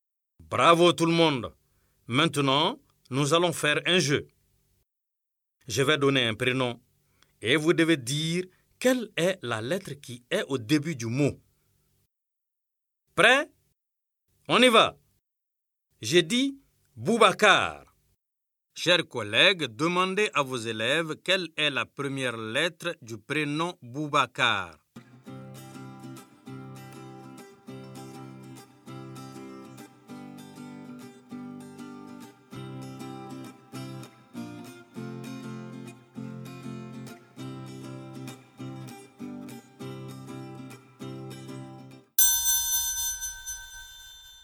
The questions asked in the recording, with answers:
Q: Chers collègues, demandez à vos élèves quelle est la première lettre du prénom Boubacar.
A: Monsieur, Boubacar commence par la lettre B.